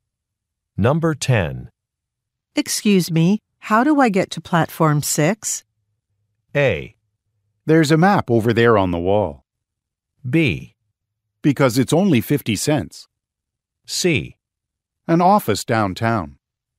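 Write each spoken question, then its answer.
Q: Excuse me, how do I get to platform 6?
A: A: There's a map over there on the wall.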